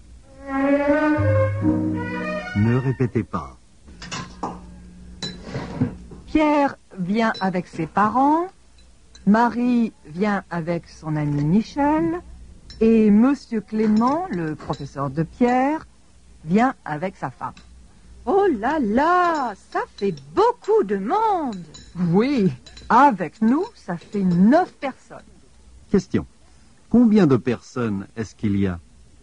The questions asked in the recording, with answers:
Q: Combien de personnes est-ce qu'il y a?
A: Il y a 9 personnes.